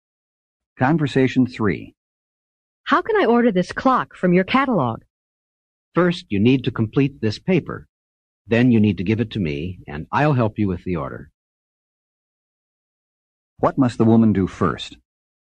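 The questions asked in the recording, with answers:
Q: What must the woman do first?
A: Complete (fill out) a paper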